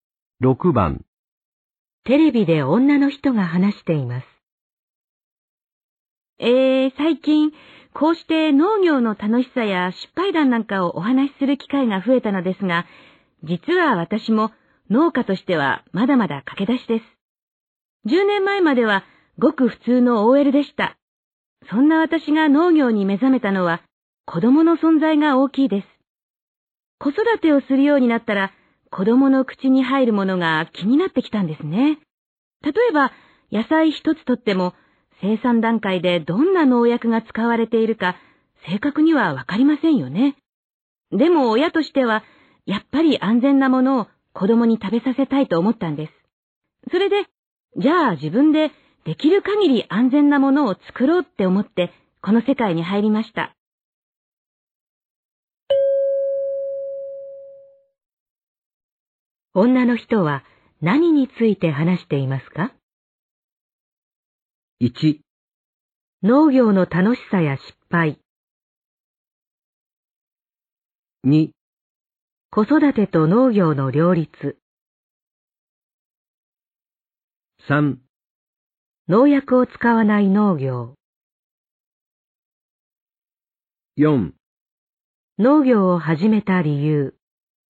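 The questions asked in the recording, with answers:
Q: 女の人は何について話していますか?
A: 4: 農業を始めた理由。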